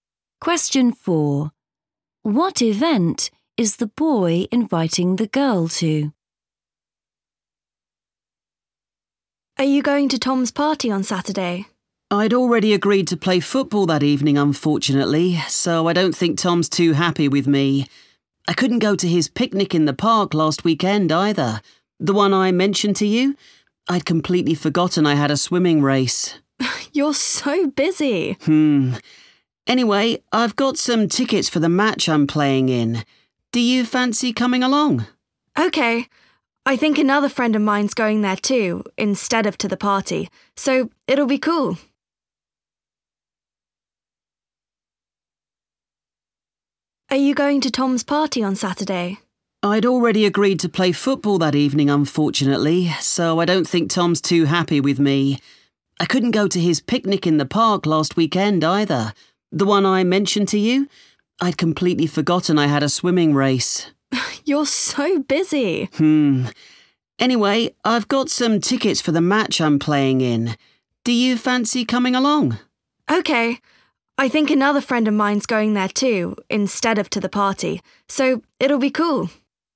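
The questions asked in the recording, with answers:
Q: What event is the boy inviting the girl to?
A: a football match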